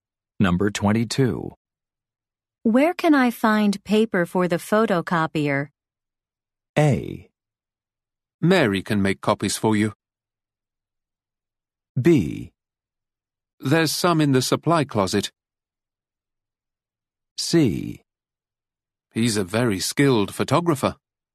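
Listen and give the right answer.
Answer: B: There's some in the supply closet.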